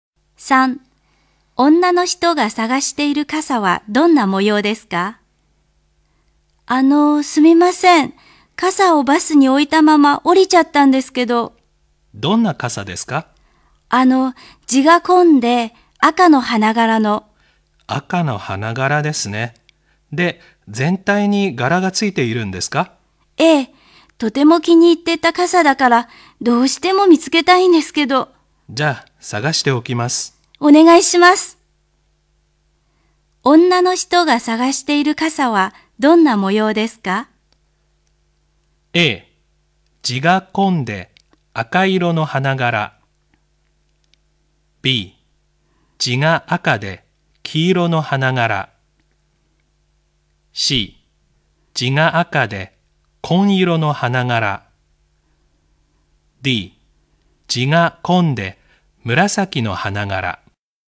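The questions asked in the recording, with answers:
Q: 女の人が探している傘はどんな模様ですか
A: A: 地が紺で赤色の花柄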